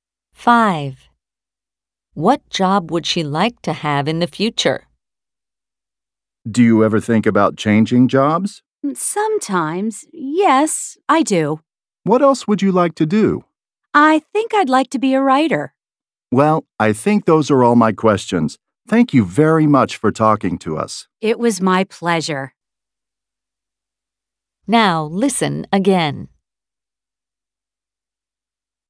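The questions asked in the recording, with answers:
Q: What job would she like to have in the future?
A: A writer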